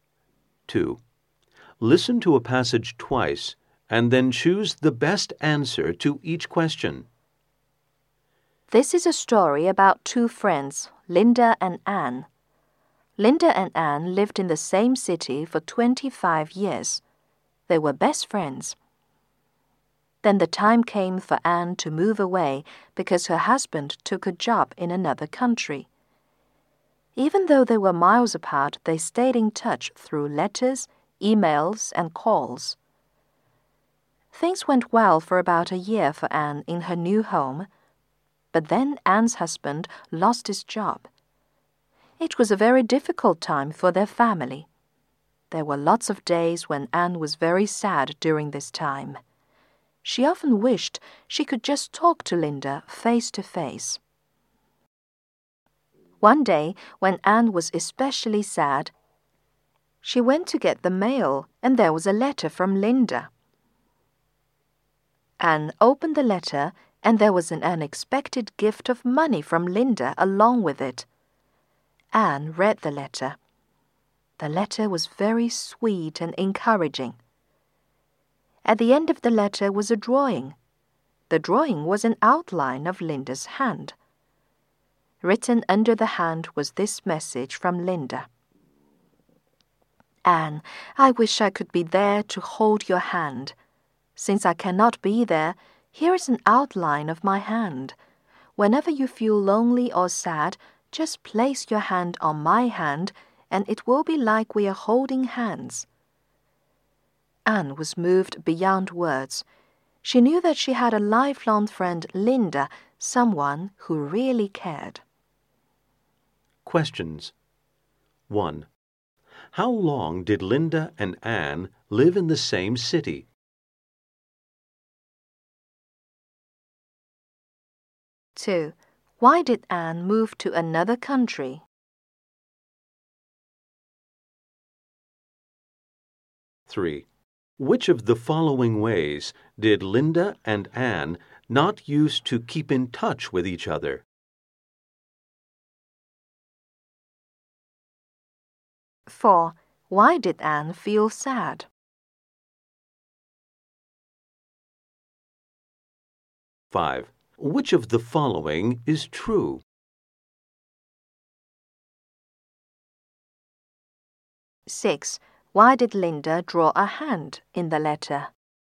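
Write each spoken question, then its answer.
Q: How long did Linda and Anne live in the same city?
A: 25 years

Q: Why did Anne move to another country?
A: Because her husband took a job in another country

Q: Why did Anne feel sad?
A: Because her husband lost his job and she missed Linda

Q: Why did Linda draw a hand in the letter?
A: So Anne could put her hand on it and feel like they were holding hands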